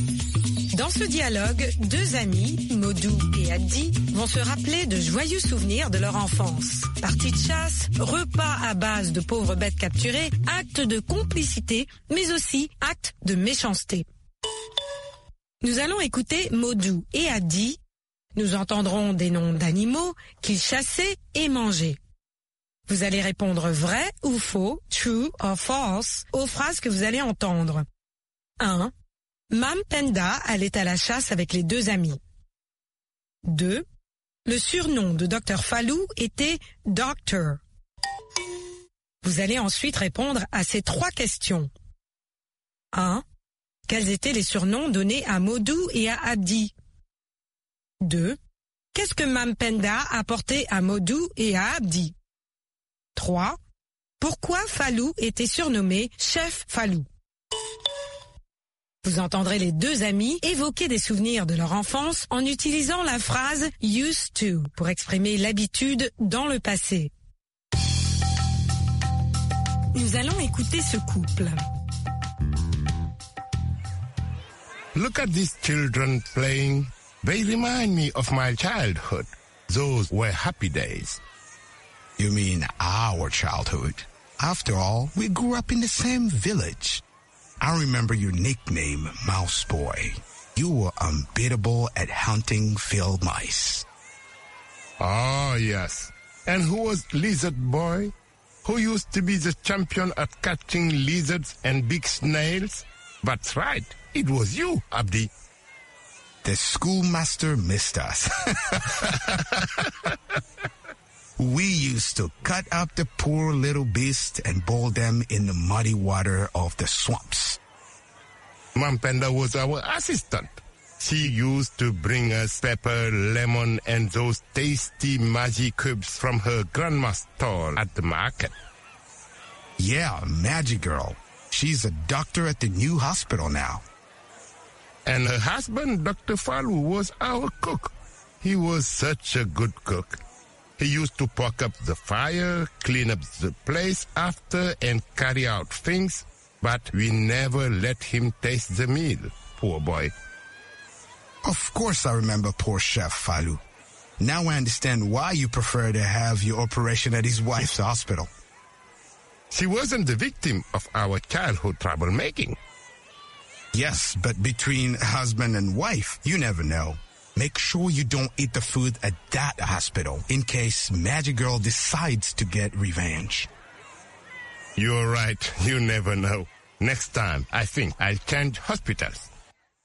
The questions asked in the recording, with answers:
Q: Mam Penda allait à la chasse avec les deux amis.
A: L'énoncé 1 est faux.

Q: Le surnom de Dr. Fallou était Doctor.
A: L'énoncé 2 est faux.

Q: Quels étaient les surnoms donnés à Modou et à Addy?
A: Mice Boy et Lizard Boy.

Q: Qu'est-ce que Mam Penda a porté à Modou et à Addy?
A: Mam Penda a porté aux deux amis du poivre, du citron et des cubes Maggi.

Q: Pourquoi Fallou était surnommé Chef Fallou?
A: Parce qu'il leur faisait la cuisine.